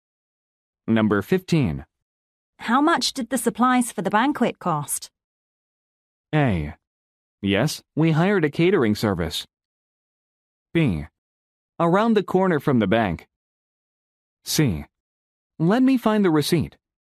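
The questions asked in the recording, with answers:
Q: How much did the supplies for the banquet cost?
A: C: Let me find the receipt.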